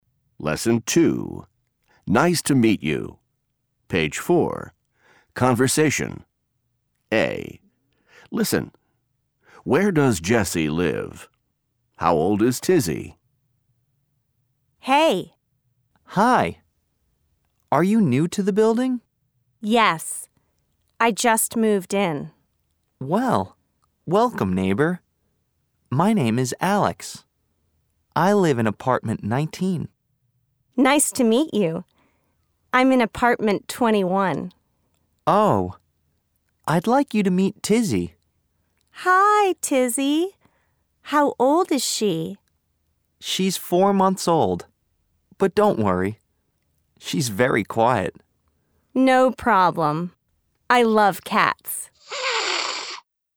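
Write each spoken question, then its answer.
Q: How old is Tizzy?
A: 4 months old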